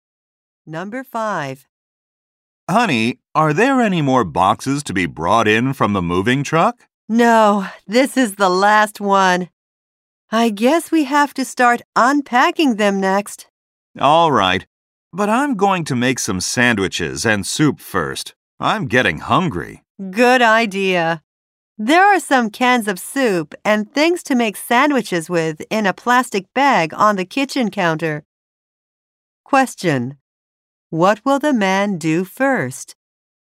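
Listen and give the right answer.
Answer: Make sandwiches and soup.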